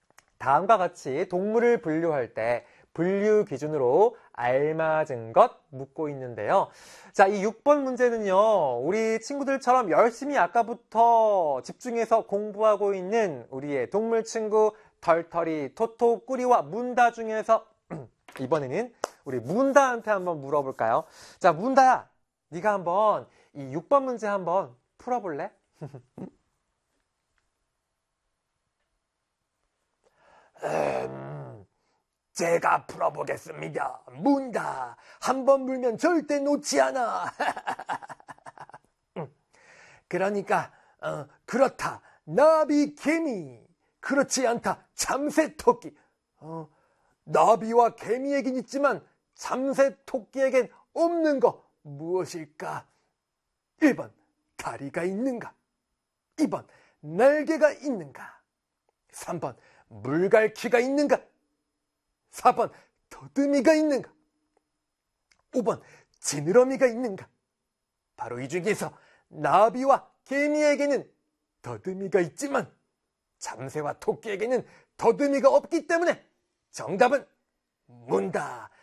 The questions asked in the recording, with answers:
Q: 나비와 개미에겐 있지만 참새토끼에겐 없는 것 무엇일까?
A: 4번 꽉 물어보겠습니다.